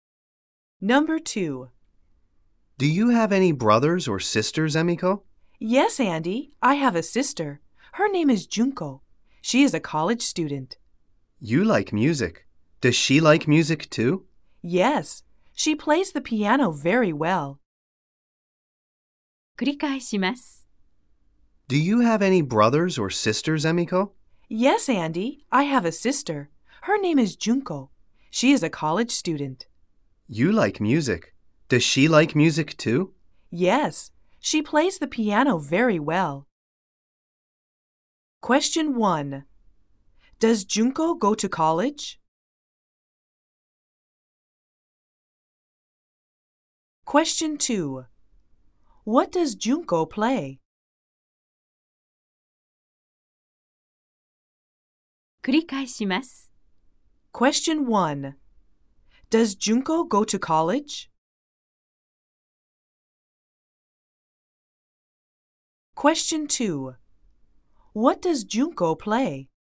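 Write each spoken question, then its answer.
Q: Does Junko go to college?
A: Yes, she does.

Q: What does Junko play?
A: She plays the piano.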